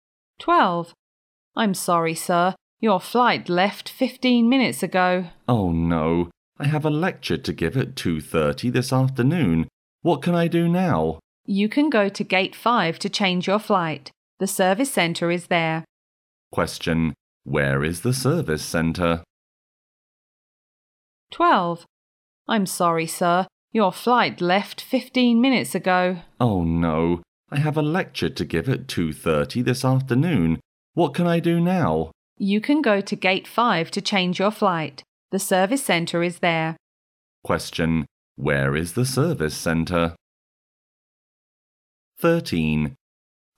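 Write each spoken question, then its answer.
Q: Where is the service centre?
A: At Gate 5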